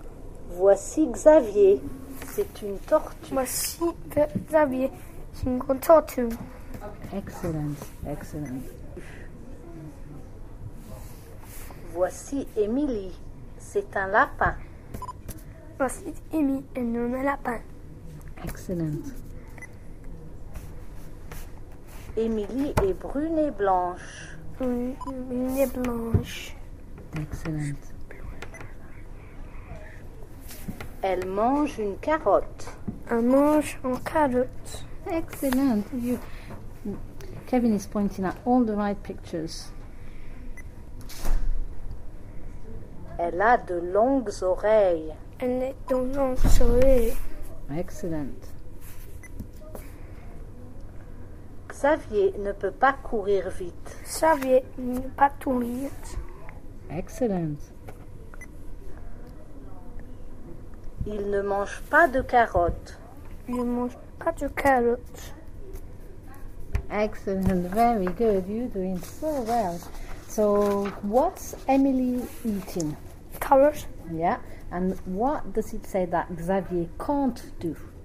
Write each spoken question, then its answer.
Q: and what does it say that Xavier can't do?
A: Xavier ne peut pas courir vite.